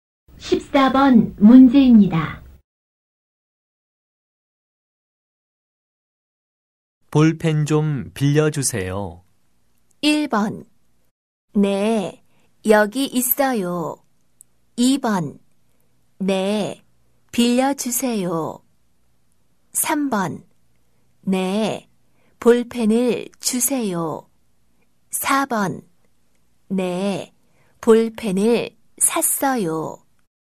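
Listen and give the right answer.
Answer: 1: 네, 여기 있어요.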